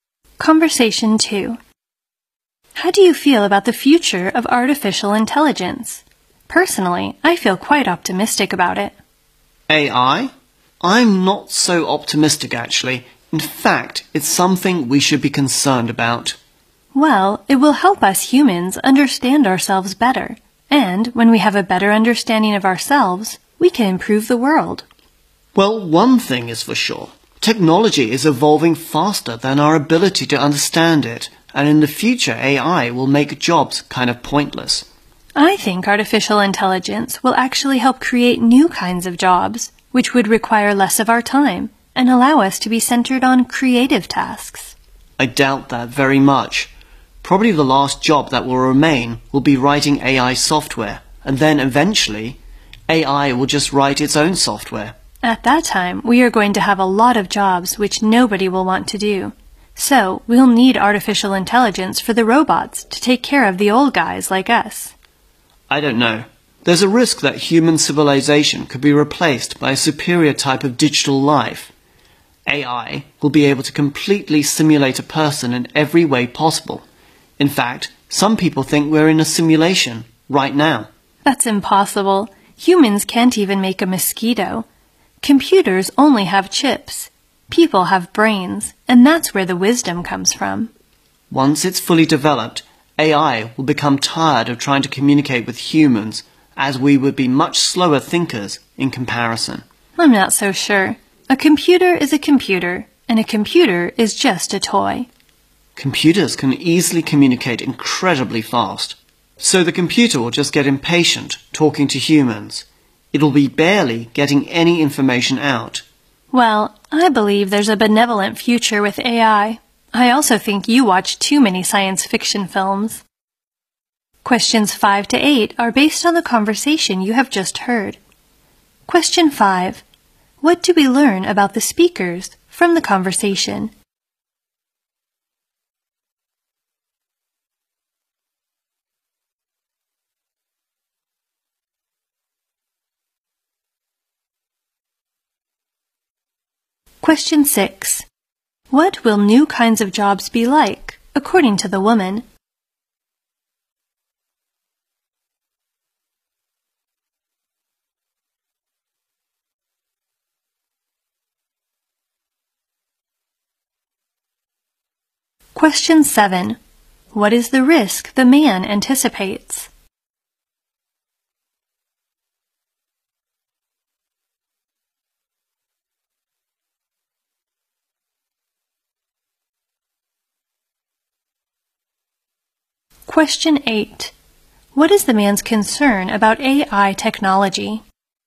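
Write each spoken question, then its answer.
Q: What do we learn about the speakers from the conversation?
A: They disagree about the future of AI: she is optimistic and he is worried.

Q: What will new kinds of jobs be like, according to the woman?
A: They will take less of our time and let us focus on creative tasks.

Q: What is the risk the man anticipates?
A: A superior digital life could replace human civilization.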